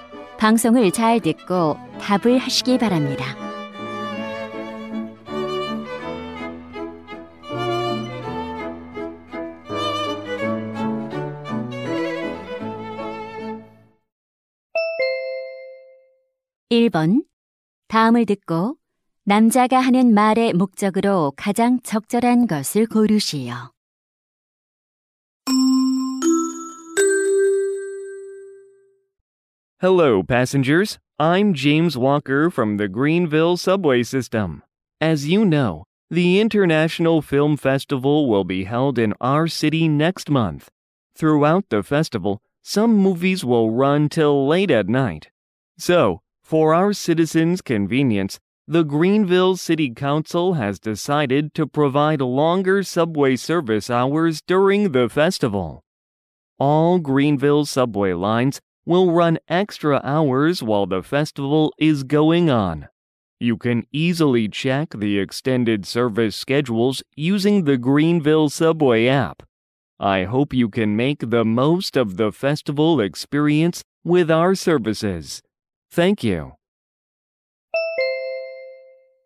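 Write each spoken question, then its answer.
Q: 다음을 듣고 남자가 하는 말의 목적으로 가장 적절한 것을 고르시오.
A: 영화제 기간 동안 지하철 운행 시간 연장을 안내하려고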